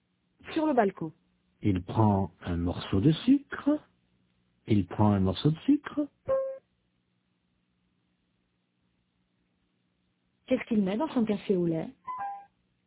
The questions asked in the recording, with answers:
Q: Qu'est-ce qu'il met dans son café au lait?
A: Un morceau de sucre.